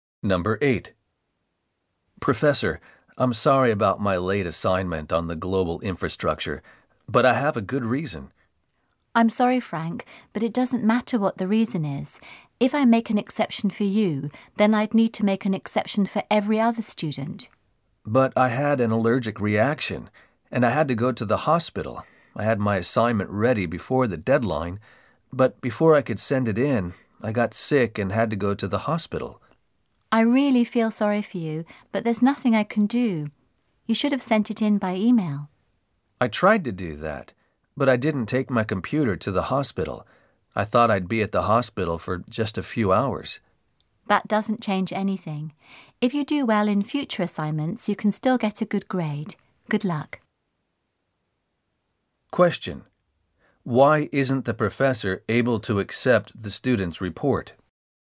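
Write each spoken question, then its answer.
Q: Why isn't the professor able to accept the student's report?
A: Because making an exception for him would mean making exceptions for every other student.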